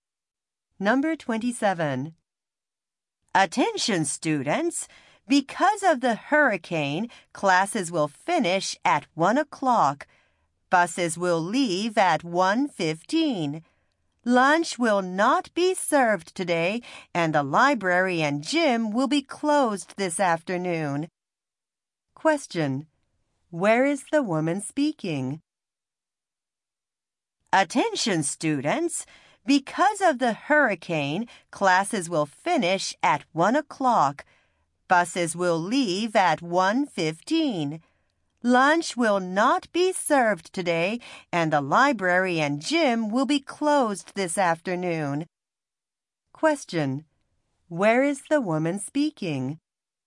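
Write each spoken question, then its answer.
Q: Where is the woman speaking?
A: At a school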